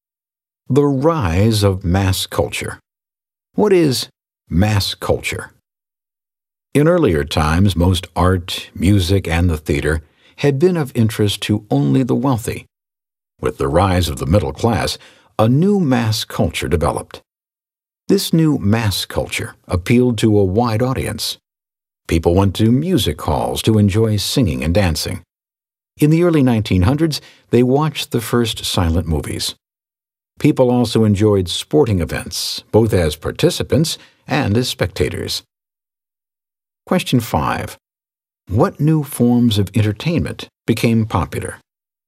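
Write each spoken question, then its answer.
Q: What new forms of entertainment became popular?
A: Music halls, silent movies, and sporting events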